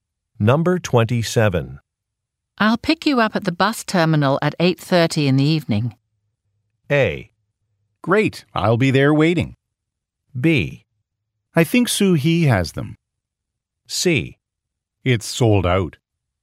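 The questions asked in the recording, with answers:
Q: I'll pick you up at the bus terminal at 8:30 in the evening.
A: A: Great, I'll be there waiting.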